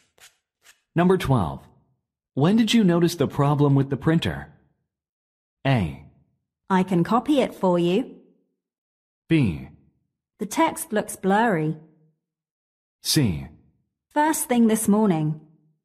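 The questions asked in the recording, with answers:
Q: When did you notice the problem with the printer?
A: C: First thing this morning.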